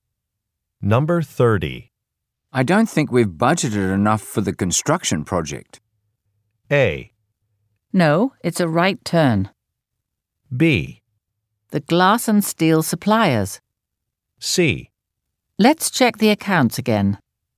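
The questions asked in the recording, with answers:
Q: I don't think we've budgeted enough for the construction project.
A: C: Let's check the accounts again.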